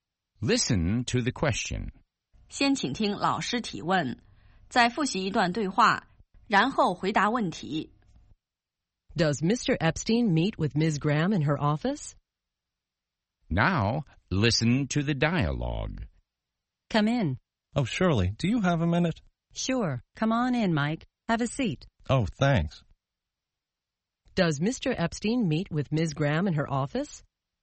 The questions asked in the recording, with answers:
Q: Does Mr. Epstein meet with Ms. Graham in her office?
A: Yes, they meet in Ms. Graham's office.